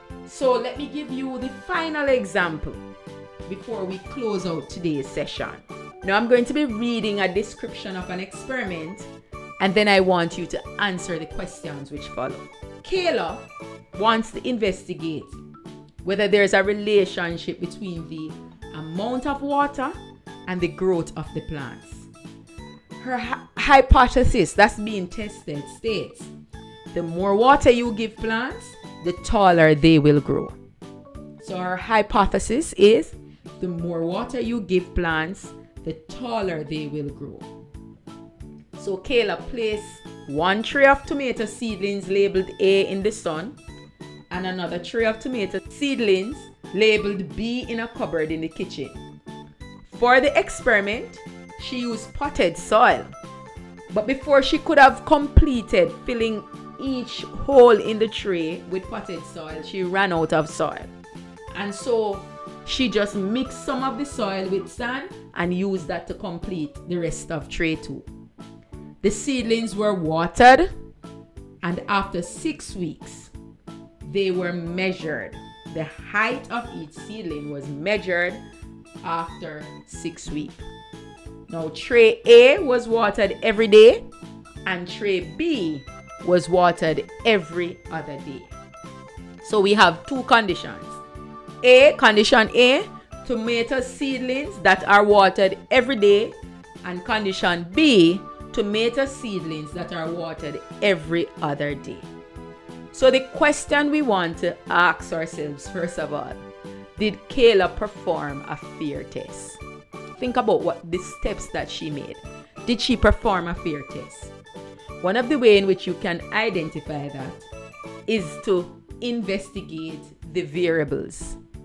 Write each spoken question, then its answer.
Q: Did she perform a fear test?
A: No, because she had so many things changing.